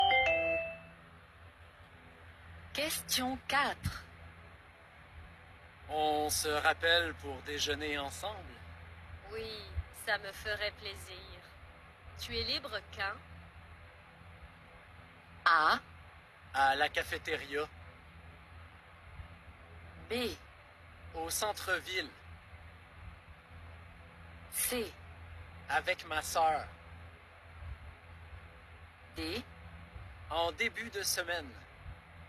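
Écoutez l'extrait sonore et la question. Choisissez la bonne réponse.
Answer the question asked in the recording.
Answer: En début de semaine.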